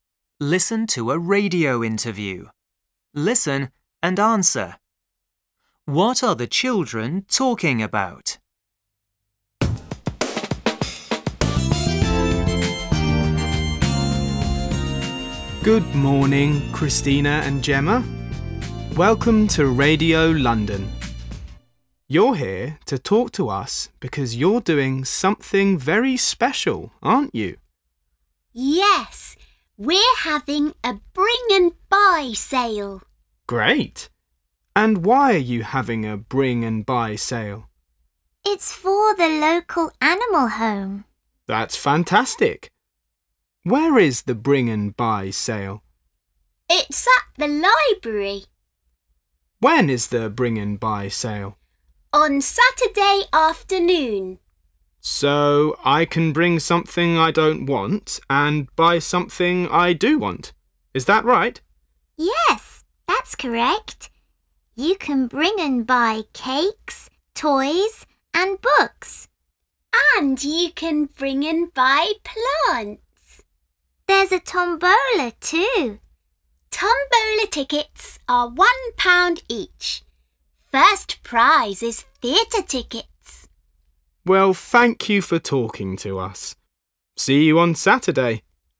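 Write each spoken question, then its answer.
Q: What are the children talking about?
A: A bring and buy sale for the local animal home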